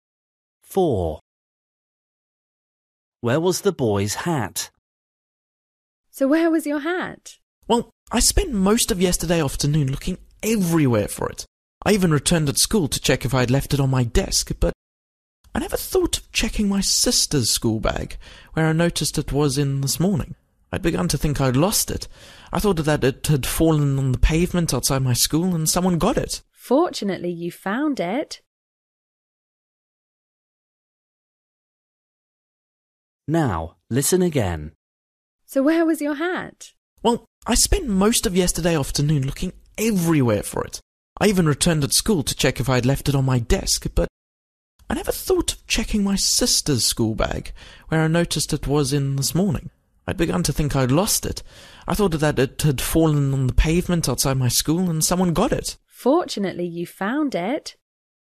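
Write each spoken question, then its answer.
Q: Where was the boy's hat?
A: in his sister's school bag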